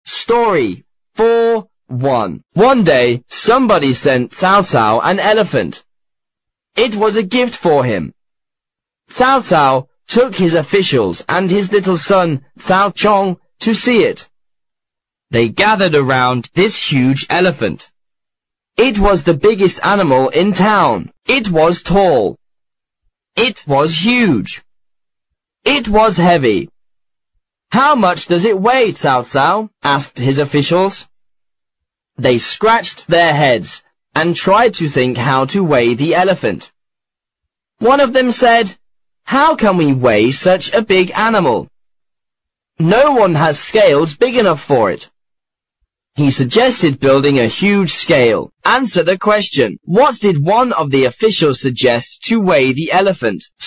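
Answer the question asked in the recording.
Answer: Building a huge scale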